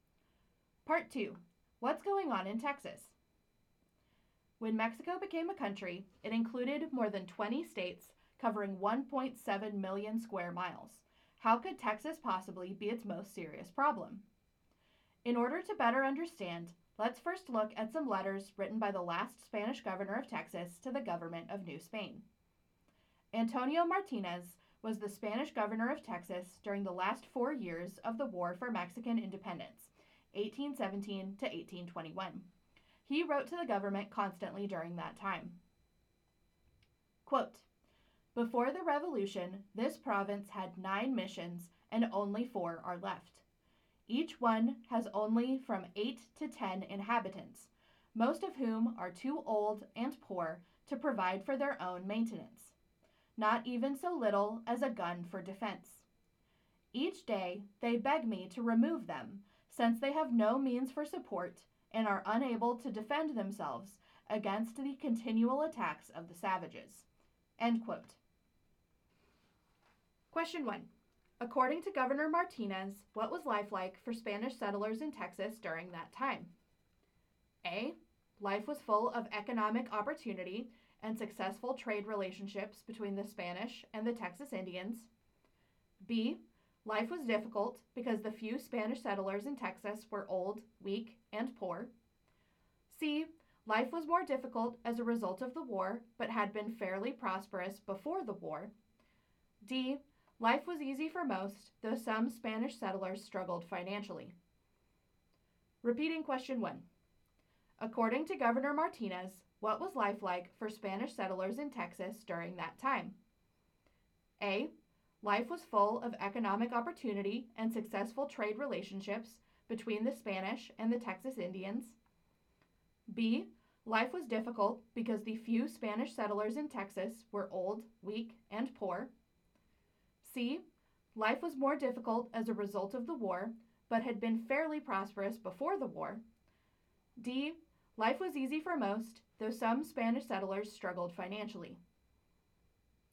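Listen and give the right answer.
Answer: B: Life was difficult because the few Spanish settlers in Texas were old, weak, and poor.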